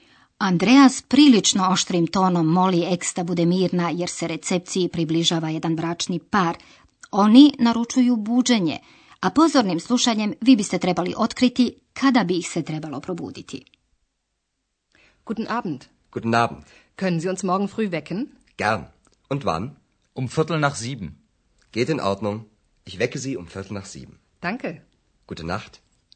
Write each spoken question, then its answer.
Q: a pozornim slušanjem vi biste trebali otkriti kada bi ih se trebalo probuditi.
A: Ovaj bračni par želi da ih se probudi otprilike oko sedam, točnije rečeno u četvrt poslije sedam.